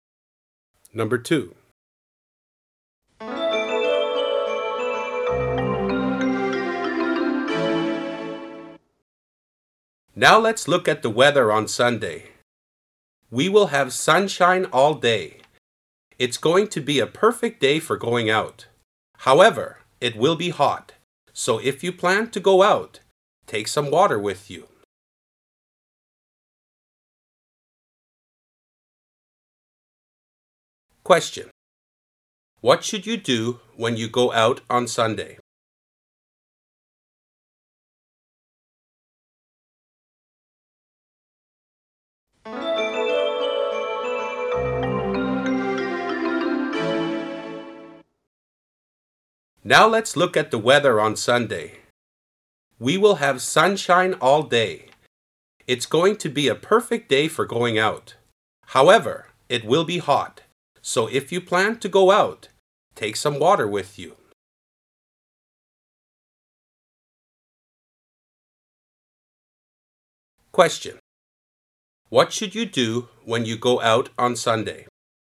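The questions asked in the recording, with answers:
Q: What should you do when you go out on Sunday?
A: Take some water with you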